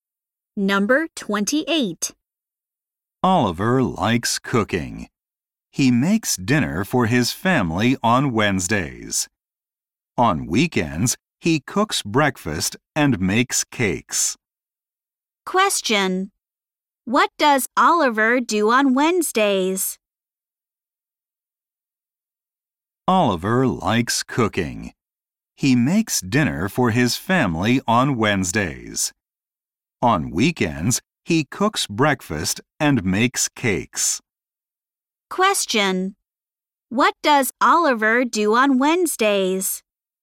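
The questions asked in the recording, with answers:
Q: What does Oliver do on Wednesdays?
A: He makes dinner for his family.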